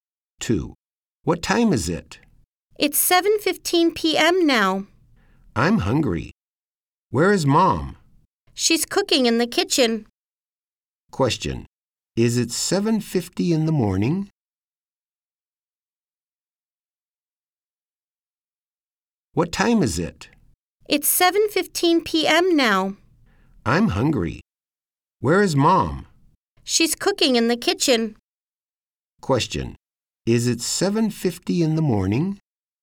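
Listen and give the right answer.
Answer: No, it's 7:15 p.m.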